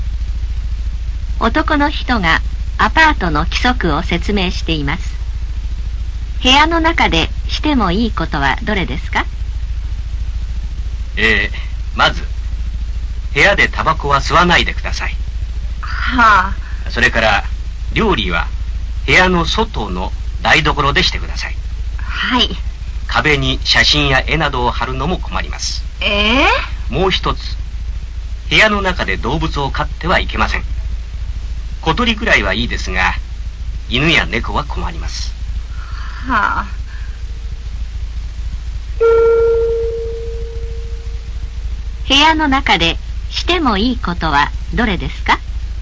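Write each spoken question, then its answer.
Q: 部屋の中でしてもいいことはどれですか?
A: 小鳥を飼うこと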